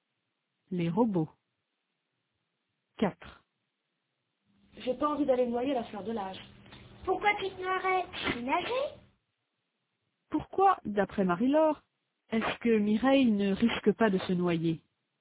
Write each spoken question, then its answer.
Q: Pourquoi, d'après Marie-Laure, est-ce que Mireille ne risque pas de se noyer?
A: Parce qu'elle sait nager.